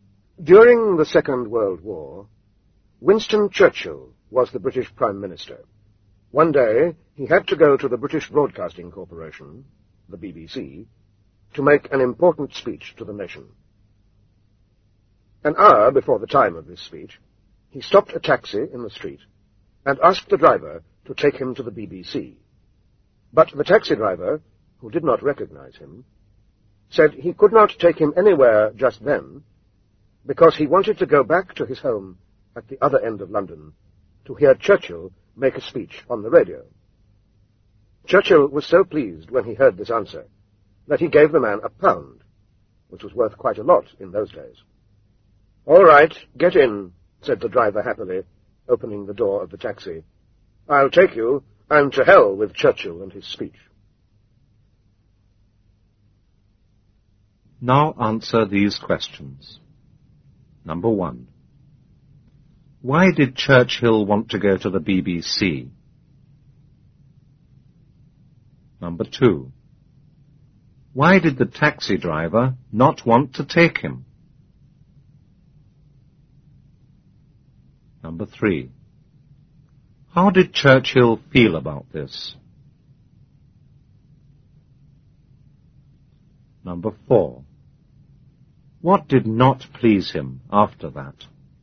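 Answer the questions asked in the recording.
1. To make an important speech to the nation
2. He wanted to go home to hear Churchill's speech on the radio
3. He was very pleased
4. The driver took the money and said "to hell with Churchill and his speech"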